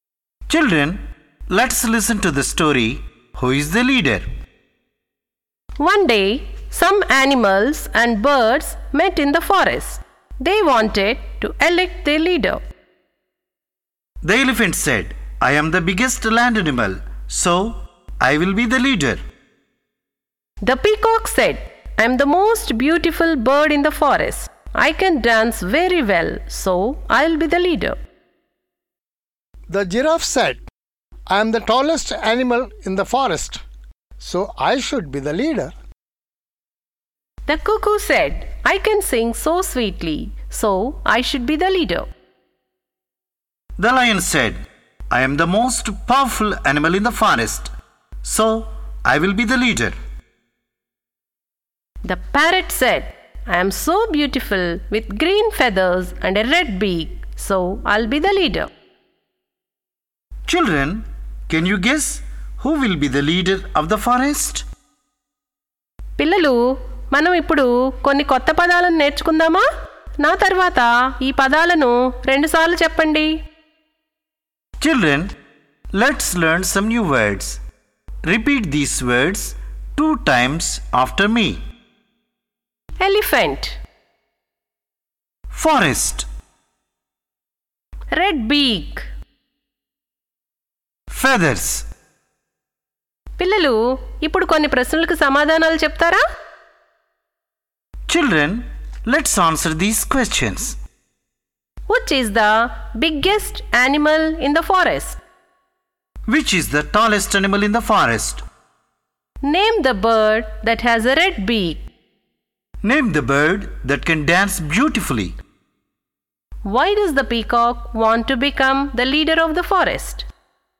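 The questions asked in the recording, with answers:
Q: Which is the biggest animal in the forest?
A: The elephant

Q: Which is the tallest animal in the forest?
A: The giraffe

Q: Name the bird that has a red beak.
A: The parrot

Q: Name the bird that can dance beautifully.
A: The peacock

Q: Why does the peacock want to become the leader of the forest?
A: It is the most beautiful bird in the forest and can dance very well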